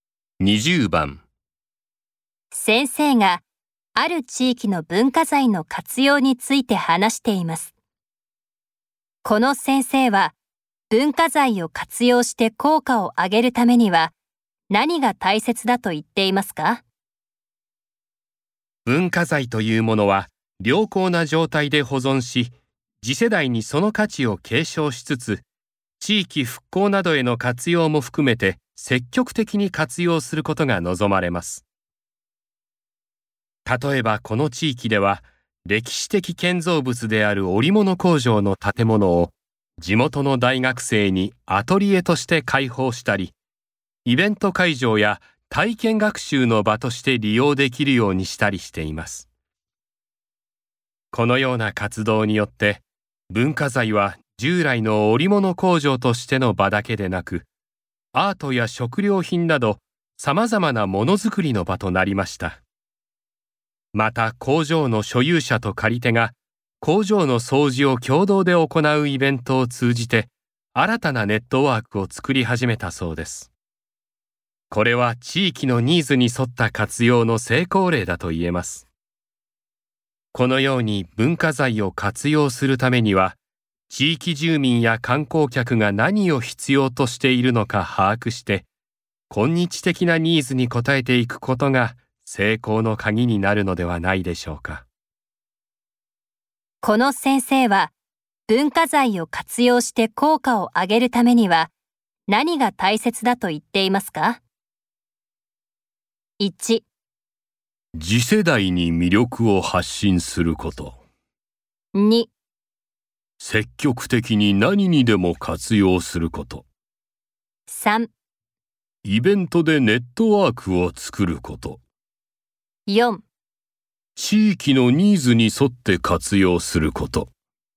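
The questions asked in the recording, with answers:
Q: この先生は、文化財を活用して効果を上げるためには何が大切だと言っていますか?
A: 4: 地域のニーズに沿って活用すること。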